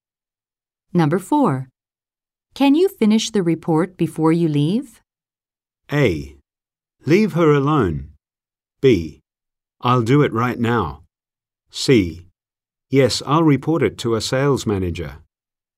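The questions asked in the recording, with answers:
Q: Can you finish the report before you leave?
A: B: I'll do it right now.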